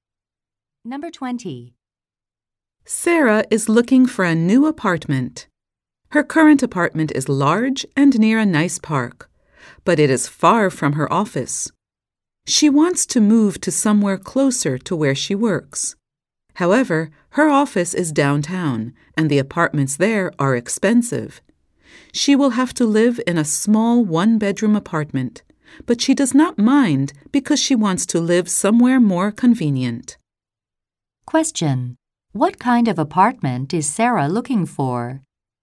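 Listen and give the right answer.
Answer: A small apartment close to her office downtown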